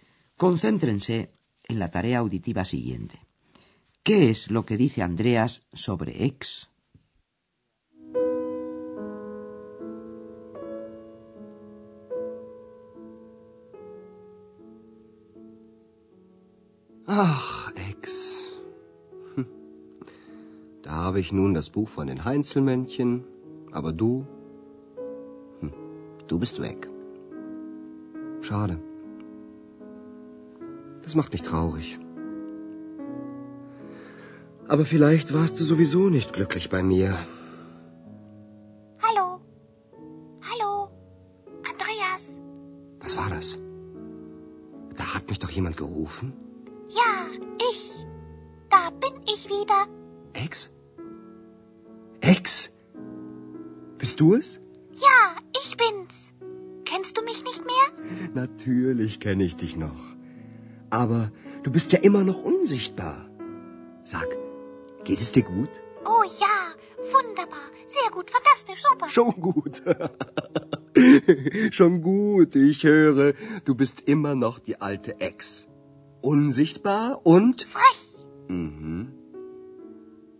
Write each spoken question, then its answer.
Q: ¿Qué es lo que dice Andreas sobre X?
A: Andreas tiene que constatar que X sigue siendo la de siempre, invisible y una fresca.